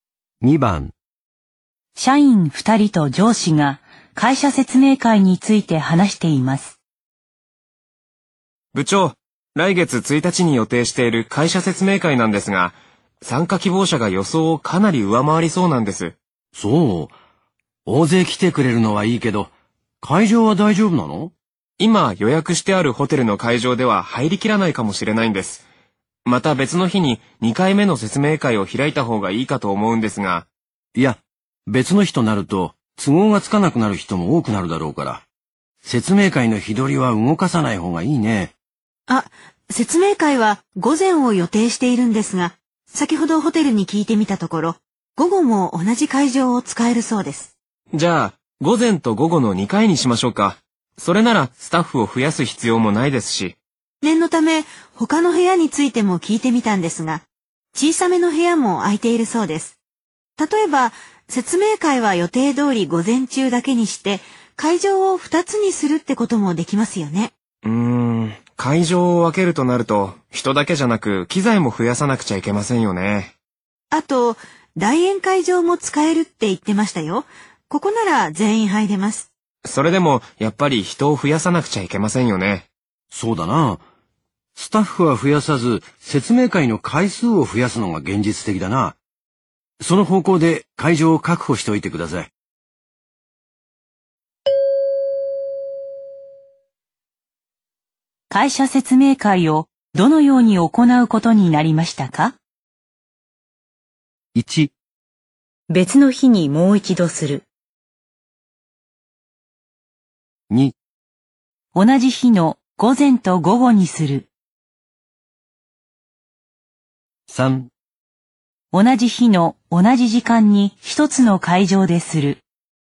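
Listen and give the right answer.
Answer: 2: 同じ日の午前と午後にする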